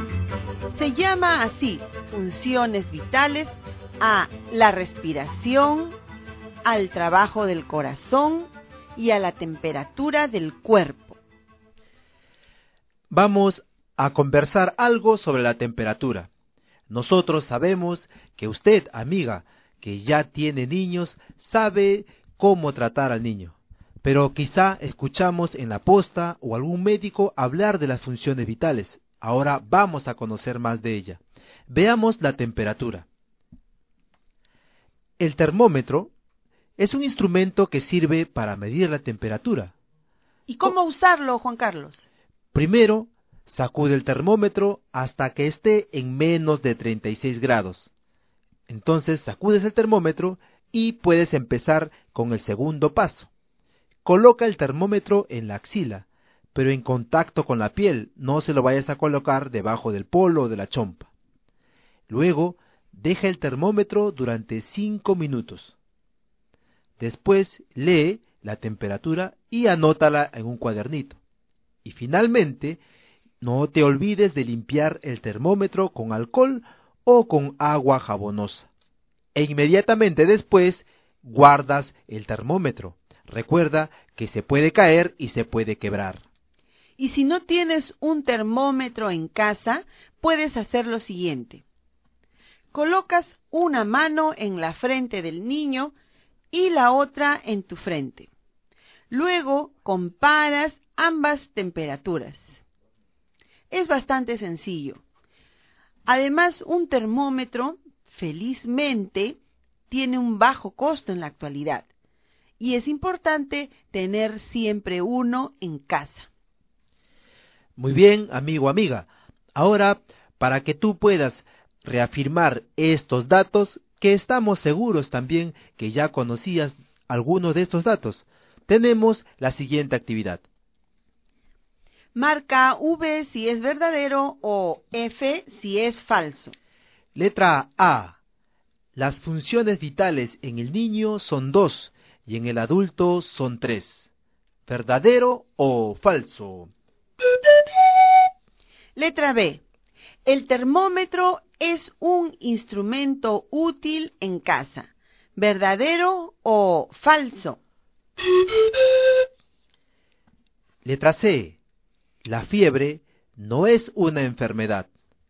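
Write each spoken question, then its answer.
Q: Las funciones vitales en el niño son 2 y en el adulto son 3.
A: Falso

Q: El termómetro es un instrumento útil en casa.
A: Verdadero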